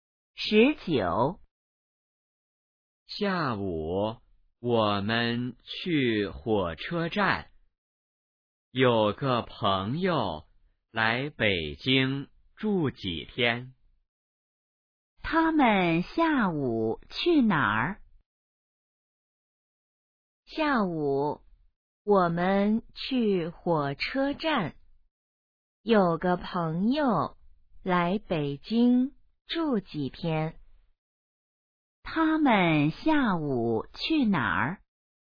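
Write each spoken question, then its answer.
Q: 他们下午去哪儿?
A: 火车站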